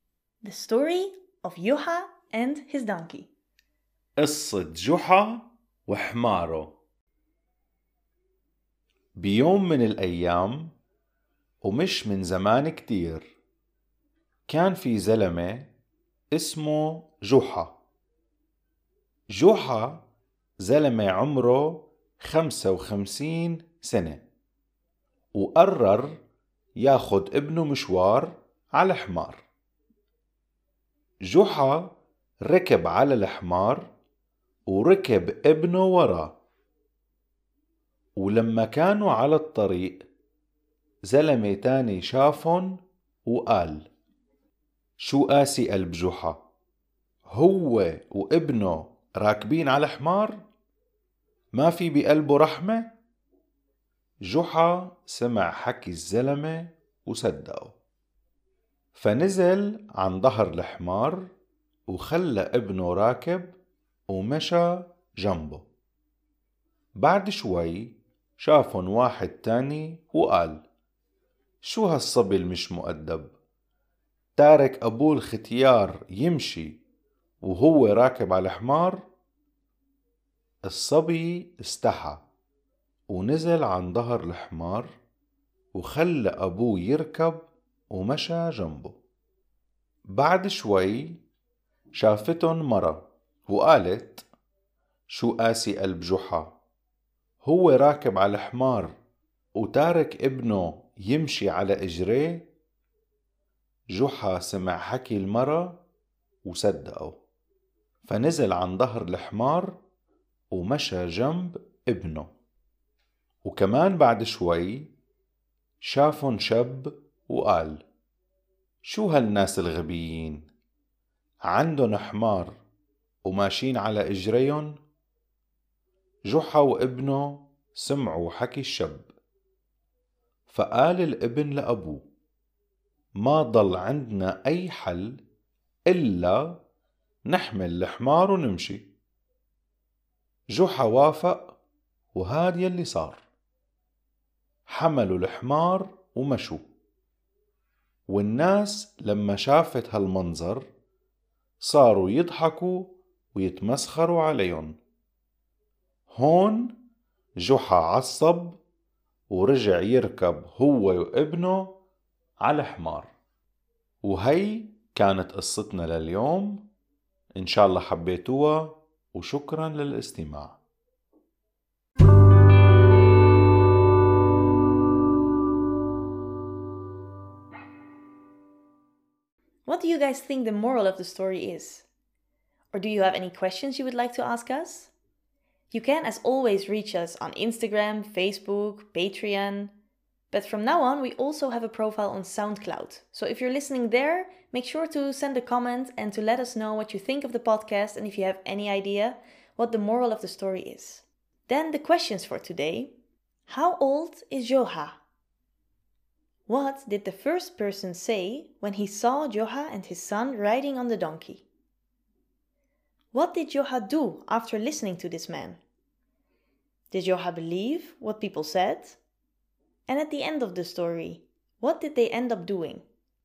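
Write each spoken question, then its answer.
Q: How old is Juha?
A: 55 years old

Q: What did the first person say when he saw Joha and his son riding on the donkey?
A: How hard-hearted Juha is, he and his son riding the donkey; has he no mercy?

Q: What did Joha do after listening to this man?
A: He got off the donkey, left his son riding, and walked beside it

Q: Did Joha believe what people said?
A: Yes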